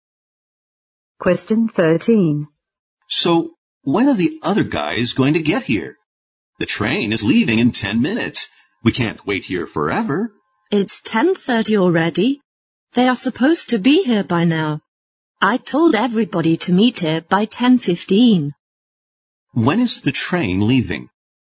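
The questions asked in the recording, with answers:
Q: When is the train leaving?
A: At 10:40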